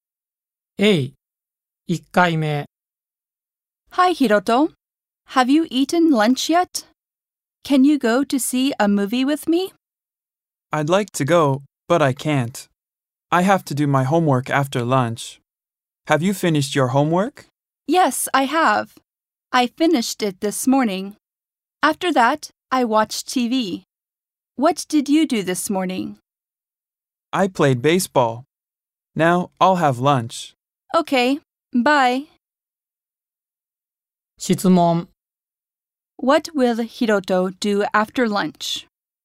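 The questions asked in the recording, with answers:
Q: What will Hiroto do after lunch?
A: He will do his homework.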